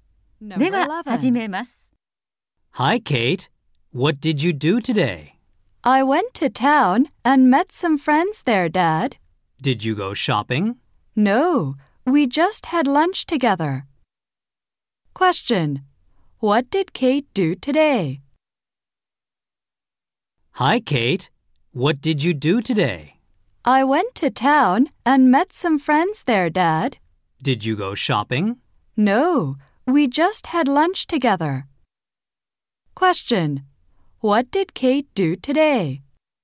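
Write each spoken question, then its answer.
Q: What did Kate do today?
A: She had lunch with friends in town.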